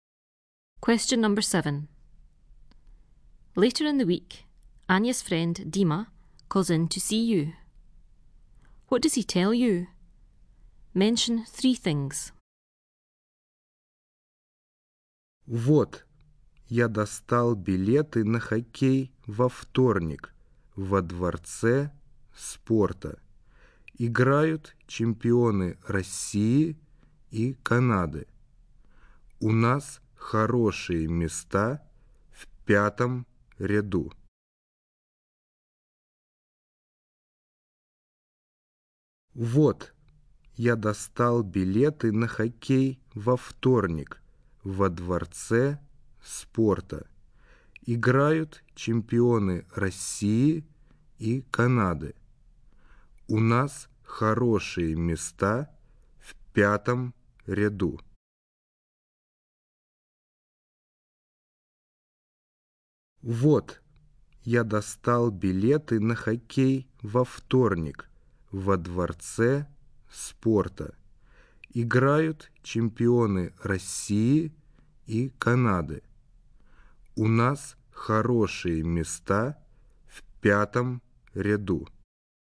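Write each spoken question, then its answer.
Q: What does he tell you? Mention three things.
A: He got tickets for the ice hockey on Tuesday at the sports palace; the champions of Russia and Canada are playing; they have good seats in the fifth row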